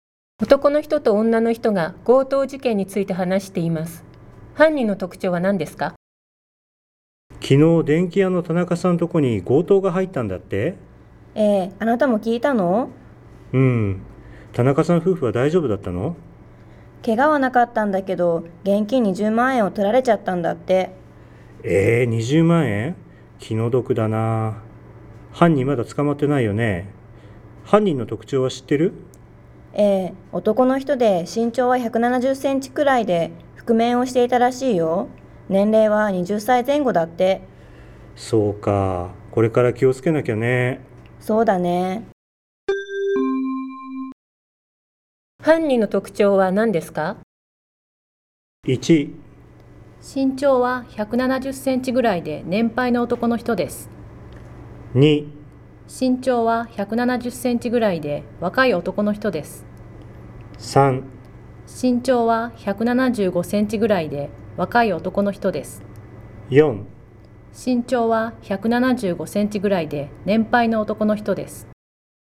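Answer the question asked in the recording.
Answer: 2: 身長は170センチぐらいで若い男の人です。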